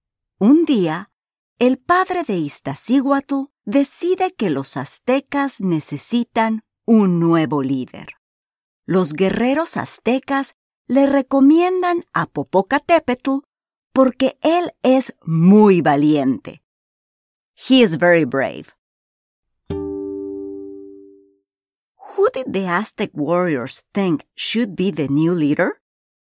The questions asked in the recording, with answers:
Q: Who did the Aztec warriors think should be the new leader?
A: Excelente. Popocatépetl.